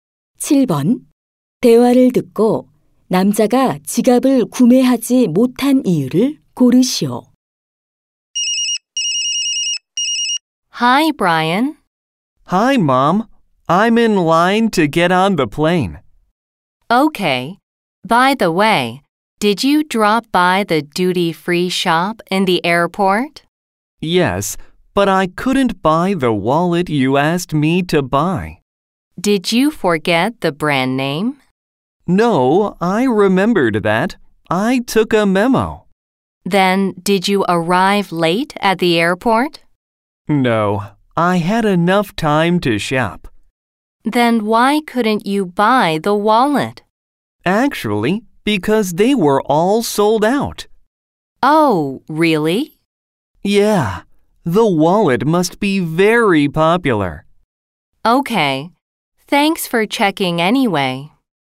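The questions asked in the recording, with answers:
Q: 대화를 듣고 남자가 지갑을 구매하지 못한 이유를 고르시오.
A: 지갑이 모두 품절되어서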